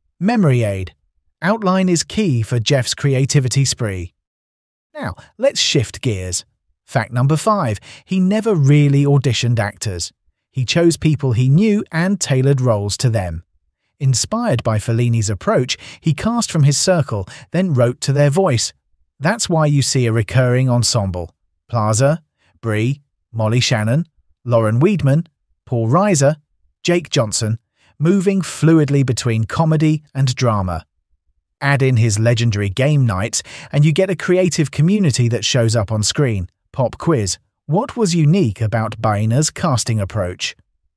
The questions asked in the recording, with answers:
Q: what was unique about Boehner's casting approach?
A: he chose actors he knew.